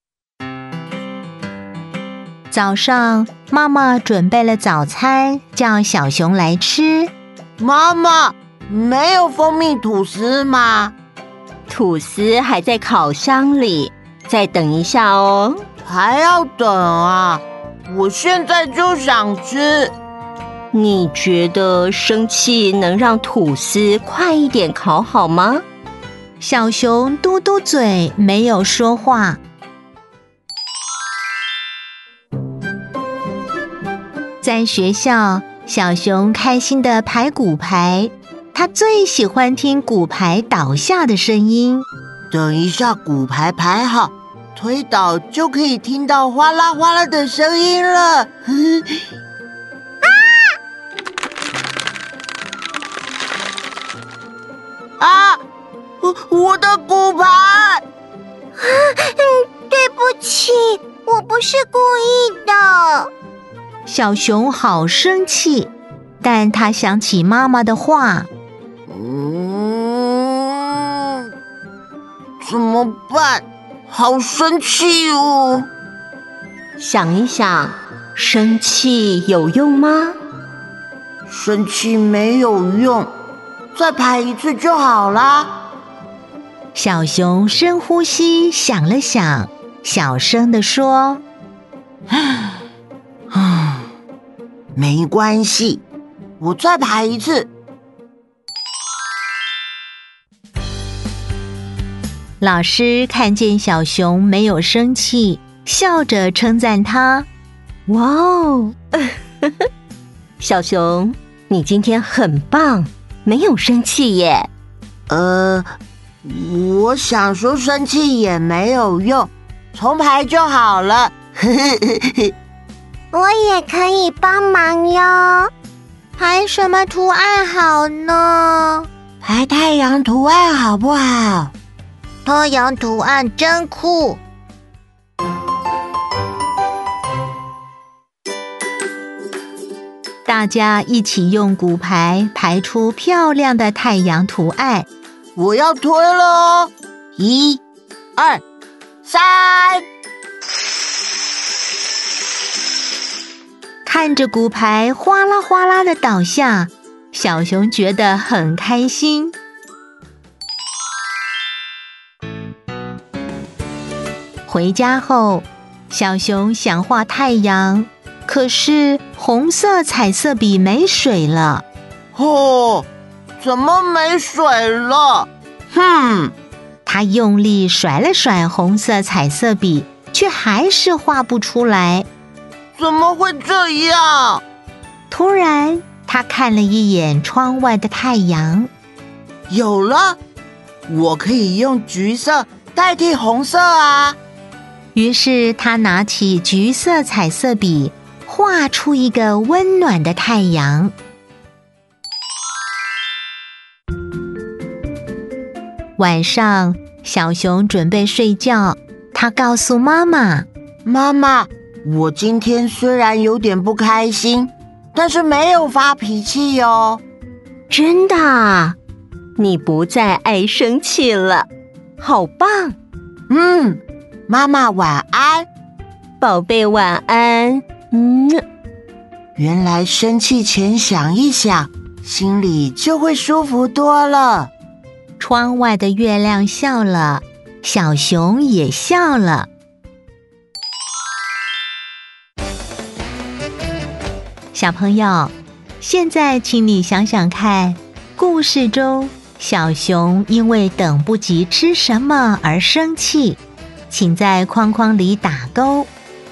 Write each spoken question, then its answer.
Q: 故事中小熊因为等不及吃什么而生气,请在框框里打勾。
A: 蜂蜜吐司。